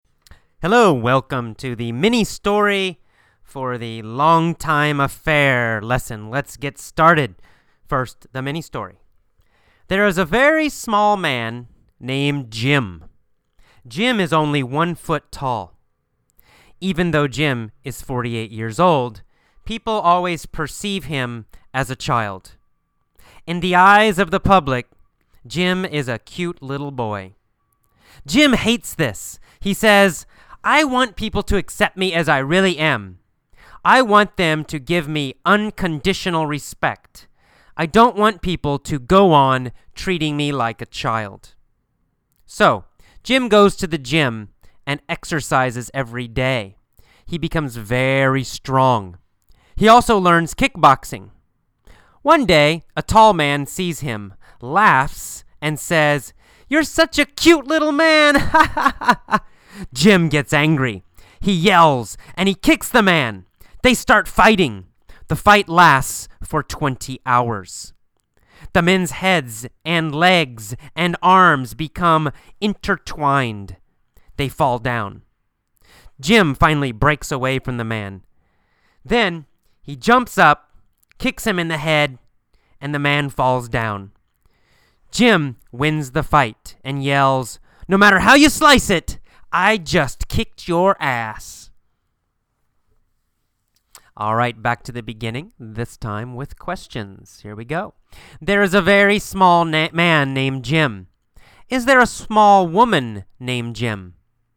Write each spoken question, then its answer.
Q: Is there a small woman named Jim?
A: No, there's not a small woman named Jim.